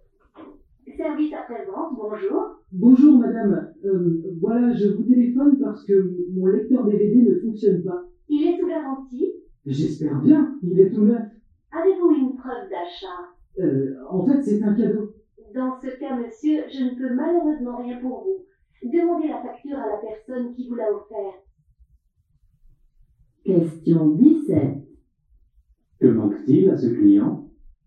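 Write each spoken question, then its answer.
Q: Que manque-t-il à ce client?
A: Une preuve d'achat (la facture)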